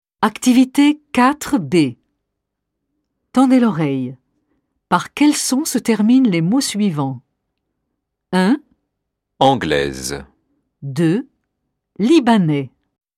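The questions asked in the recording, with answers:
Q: Par quel son se terminent les mots suivants? 1. Anglaise.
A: le son [z]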